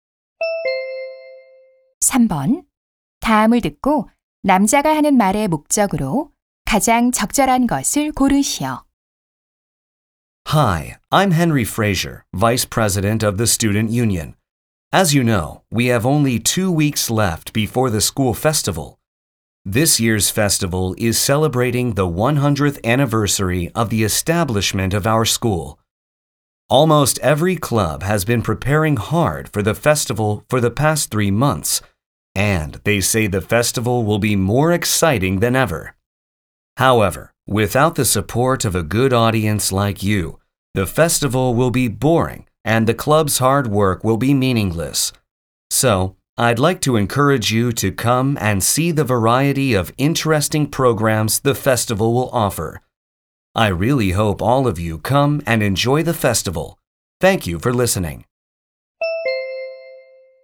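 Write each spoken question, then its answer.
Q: 다음을 듣고 남자가 하는 말의 목적으로 가장 적절한 것을 고르시오.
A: 학교 축제에 와서 즐기도록 독려하려고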